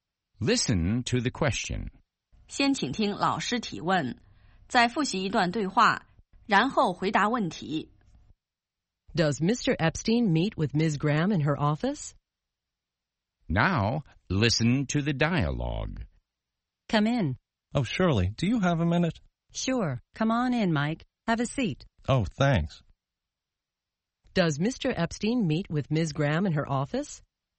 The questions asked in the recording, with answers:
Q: Does Mr. Epstein meet with Ms. Graham in her office?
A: Yes, they meet in Ms. Graham's office.